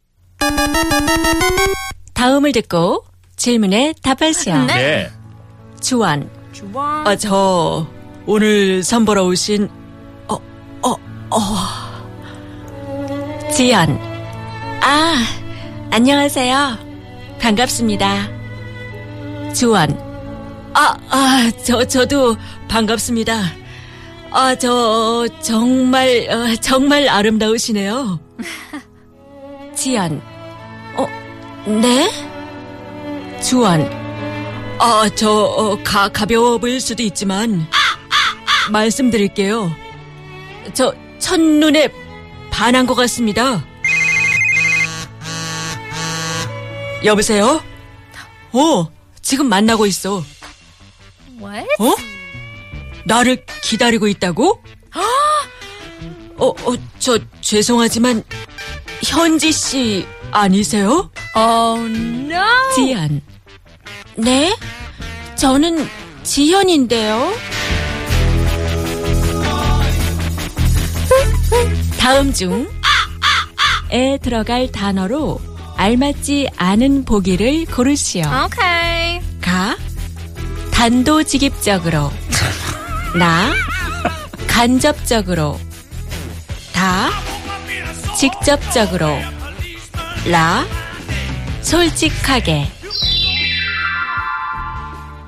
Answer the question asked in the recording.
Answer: Na. I'll tell you indirectly.